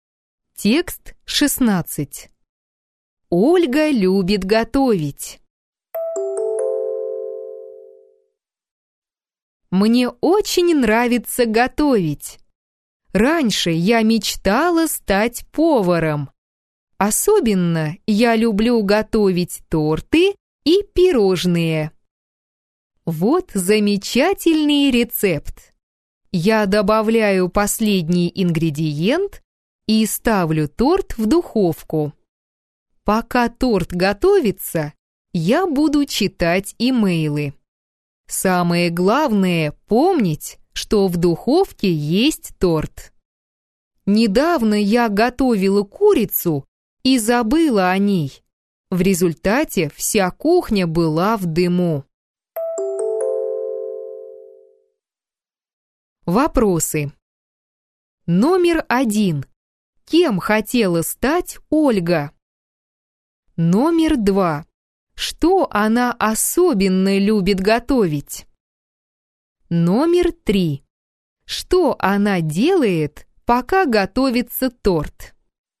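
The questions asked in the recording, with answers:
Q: Кем хотела стать Ольга?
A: Поваром

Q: Что она особенно любит готовить?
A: Торты и пирожные

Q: Что она делает, пока готовится торт?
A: Читает имейлы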